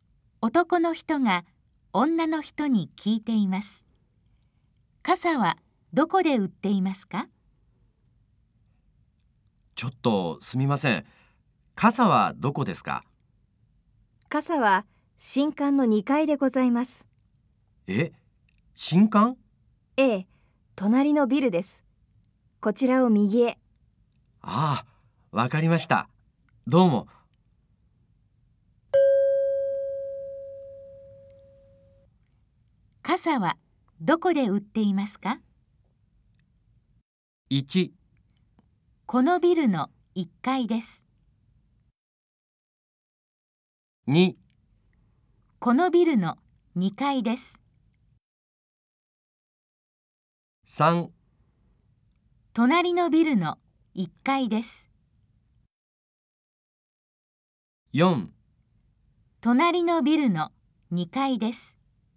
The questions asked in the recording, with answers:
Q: 傘はどこで売っていますか?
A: 正しい答えは4です。